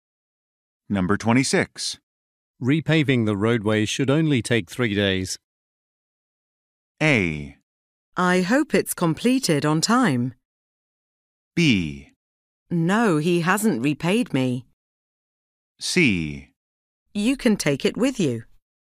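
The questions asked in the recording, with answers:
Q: Repaving the roadway should only take 3 days.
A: A: I hope it's completed on time.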